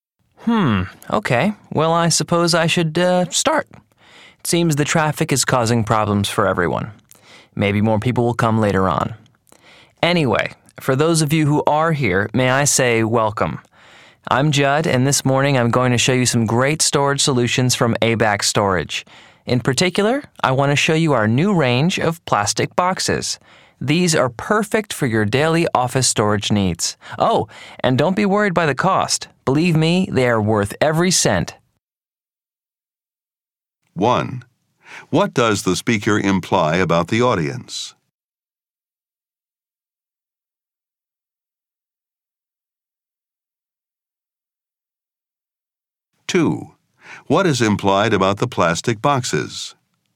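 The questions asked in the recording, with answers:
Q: What does the speaker imply about the audience?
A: Fewer people came than expected; some are delayed by traffic.

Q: What is implied about the plastic boxes?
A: They are expensive.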